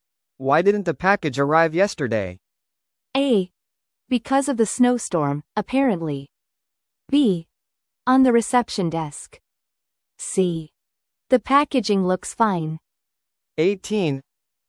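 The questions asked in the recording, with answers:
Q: Why didn't the package arrive yesterday?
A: A: Because of the snowstorm, apparently.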